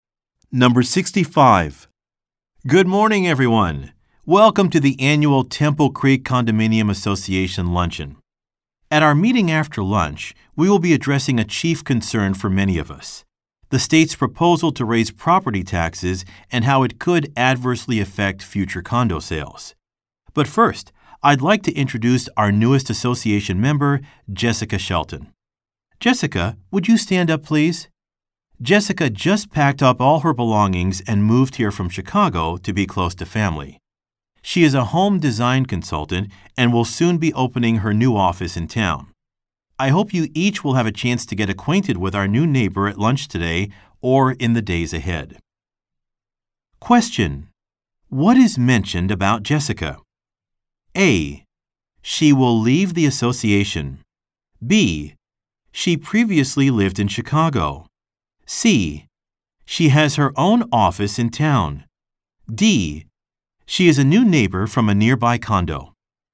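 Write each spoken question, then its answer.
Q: what is mentioned about Jessica?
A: B: She previously lived in Chicago.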